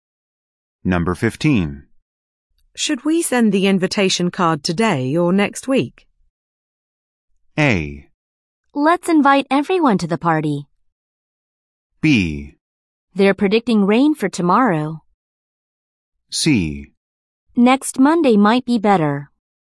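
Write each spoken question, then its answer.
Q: Should we send the invitation card today or next week?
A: C: Next Monday might be better.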